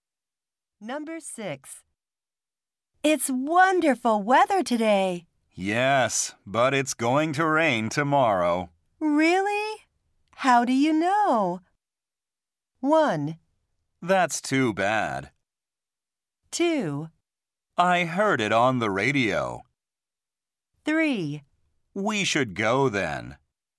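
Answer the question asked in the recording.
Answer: 2: I heard it on the radio.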